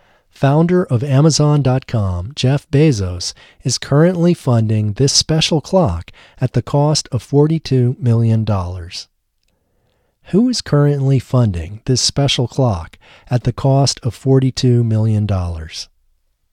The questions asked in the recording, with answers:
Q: Who is currently funding this special clock at the cost of $42 million?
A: Founder of Amazon.com, Jeff Bezos, is currently funding this special clock at the cost of $42 million.